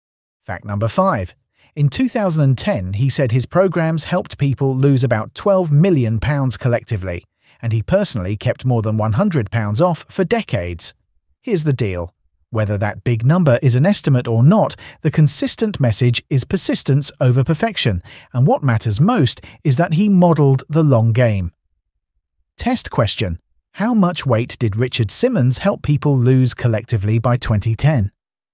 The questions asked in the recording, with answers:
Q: How much weight did Richard Simmons help people lose collectively by 2010?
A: Correct answer. About £12 million.